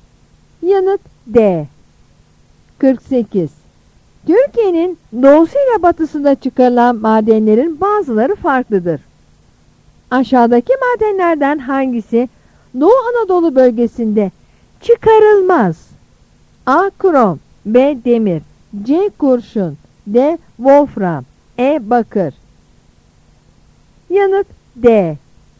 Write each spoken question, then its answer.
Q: Aşağıdaki madenlerden hangisi Doğu Anadolu bölgesinde çıkarılmaz?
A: Yanıt D.